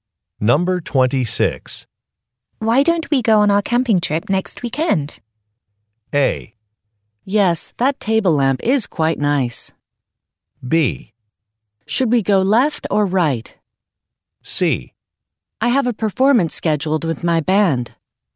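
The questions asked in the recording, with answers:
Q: Why don't we go on our camping trip next weekend?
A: C: I have a performance scheduled with my band.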